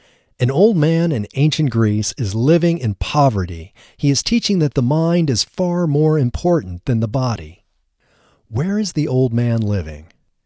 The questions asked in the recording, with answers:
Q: Where is the old man living?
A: The old man is living in ancient Greece.